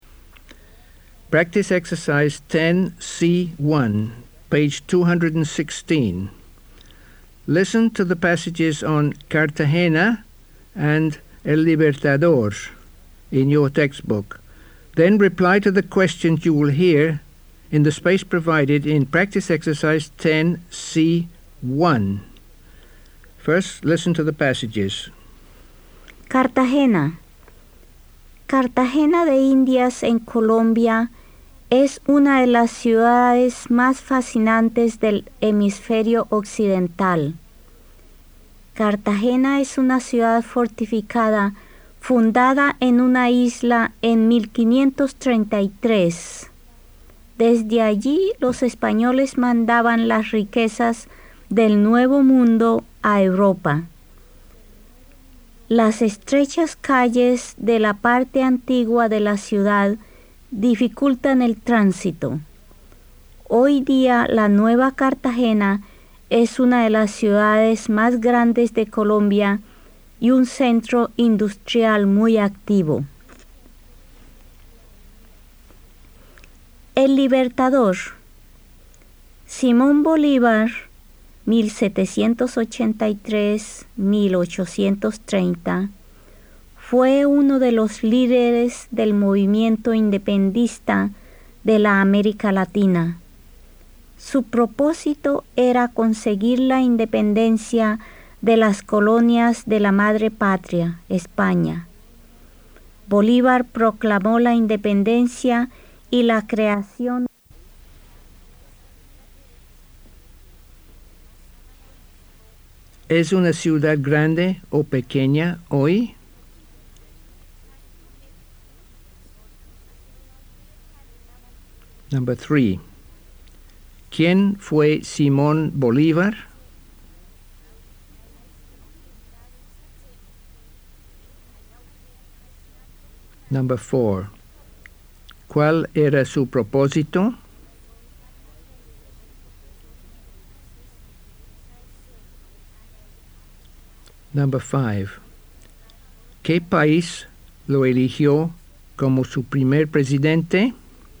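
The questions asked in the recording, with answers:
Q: ¿Es una ciudad grande o pequeña hoy?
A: Grande; es una de las ciudades más grandes de Colombia

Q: ¿Quién fue Simón Bolívar?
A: Uno de los líderes del movimiento independentista de la América Latina

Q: ¿Cuál era su propósito?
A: Conseguir la independencia de las colonias de España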